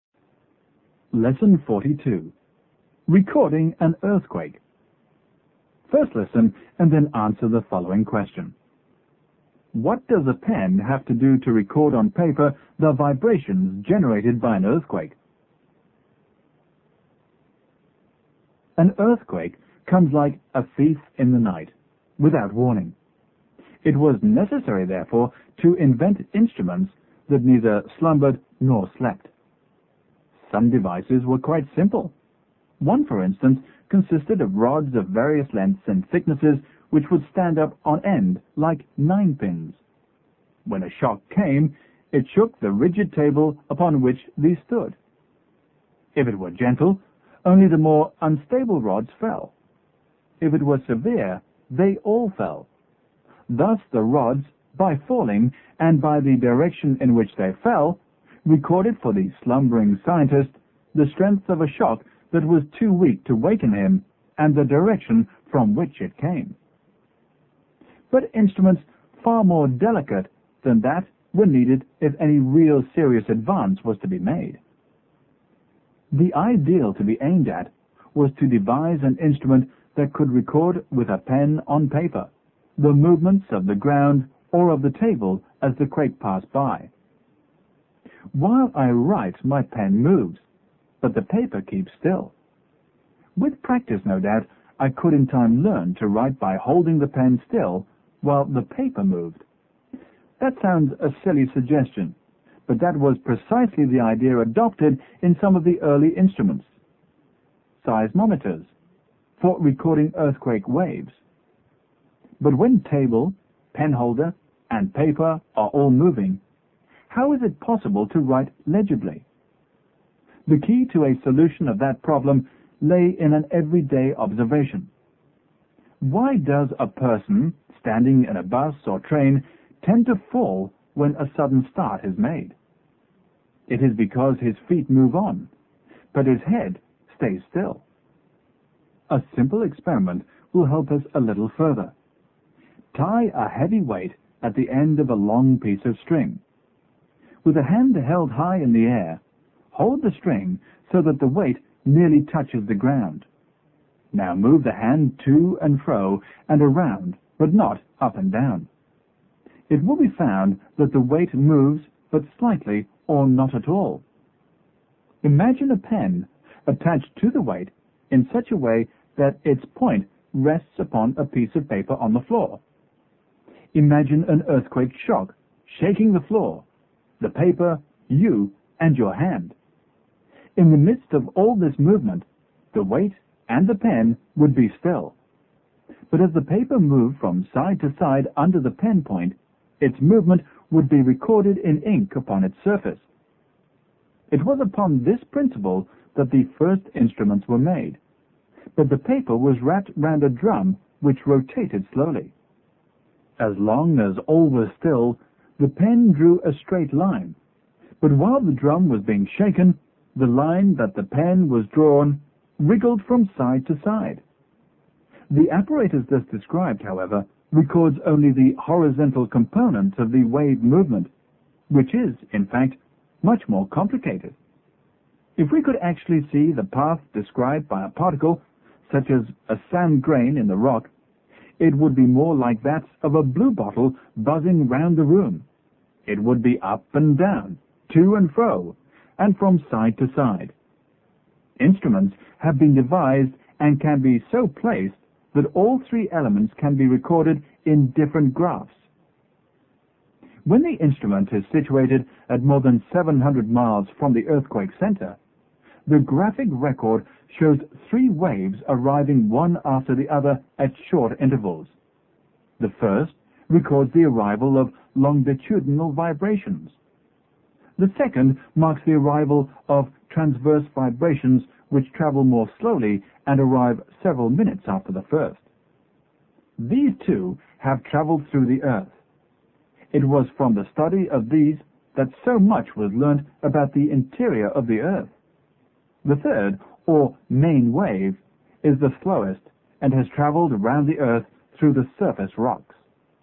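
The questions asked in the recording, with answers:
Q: What does a pen have to do to record on paper the vibrations generated by an earthquake?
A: It must stay still while the paper moves beneath it.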